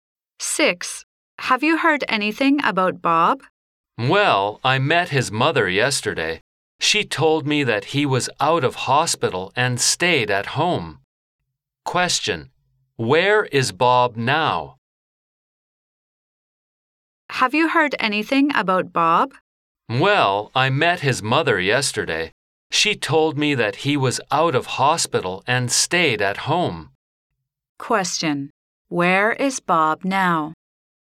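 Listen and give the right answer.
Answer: At home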